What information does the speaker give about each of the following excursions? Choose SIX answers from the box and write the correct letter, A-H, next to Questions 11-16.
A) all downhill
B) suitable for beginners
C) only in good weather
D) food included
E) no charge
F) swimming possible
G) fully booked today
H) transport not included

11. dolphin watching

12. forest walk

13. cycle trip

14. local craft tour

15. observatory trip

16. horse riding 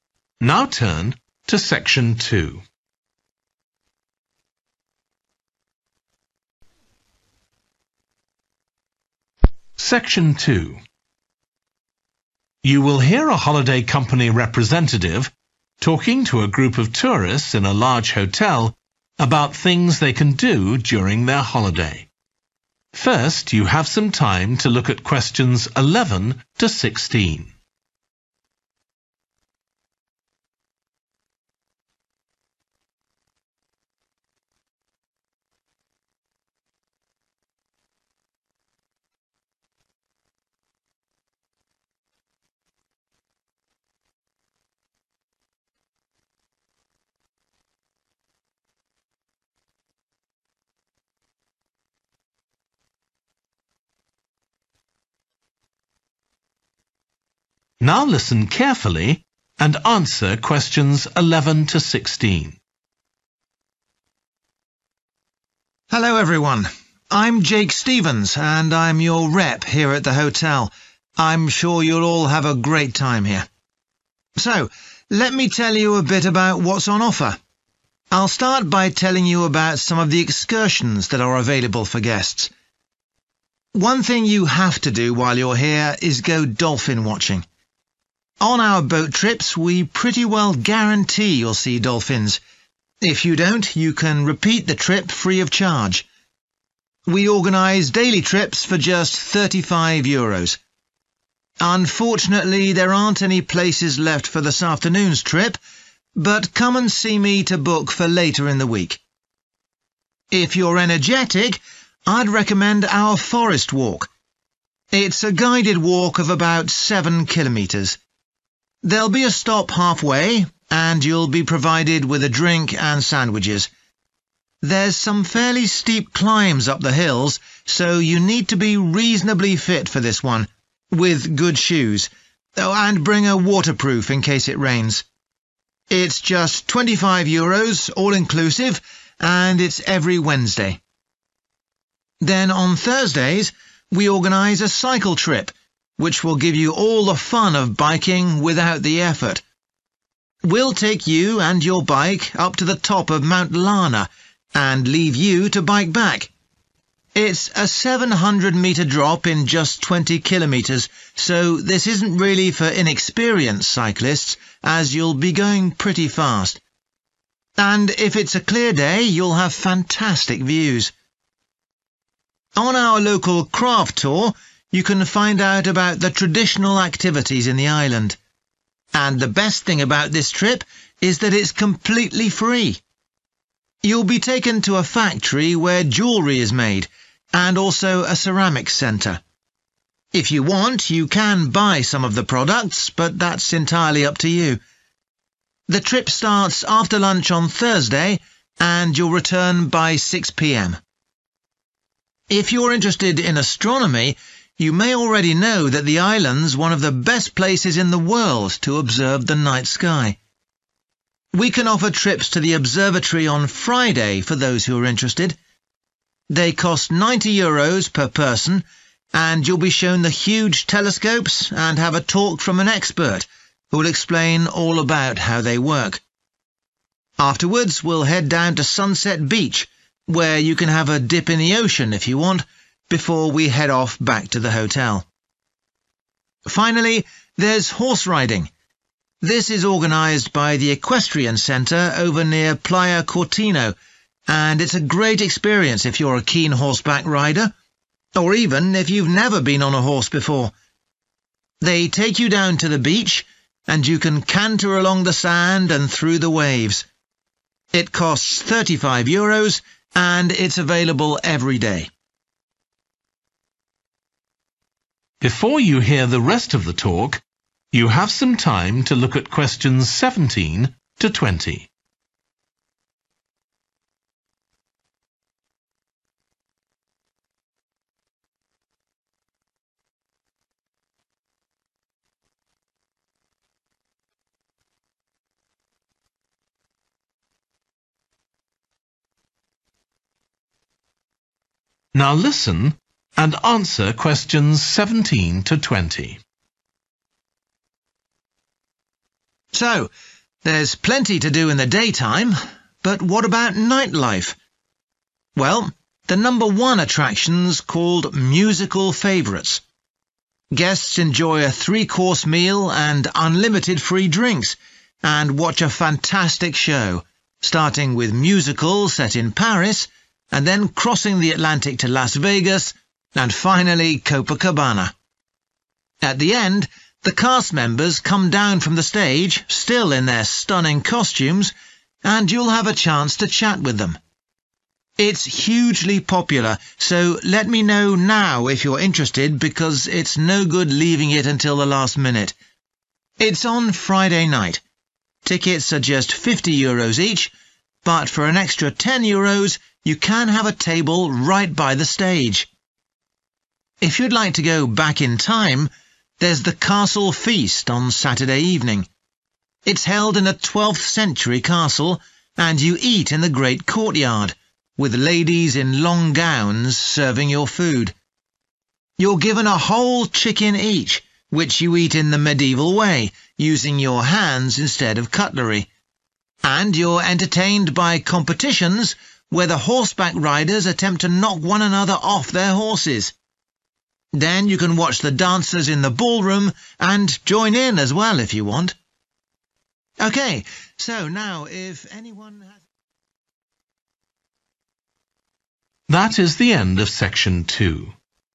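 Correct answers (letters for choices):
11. G
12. D
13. A
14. E
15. F
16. B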